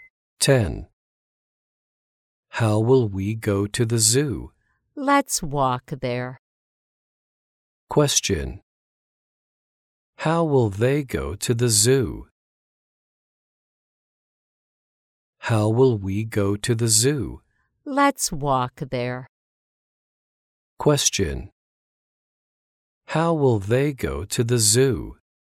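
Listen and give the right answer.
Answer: On foot (walk).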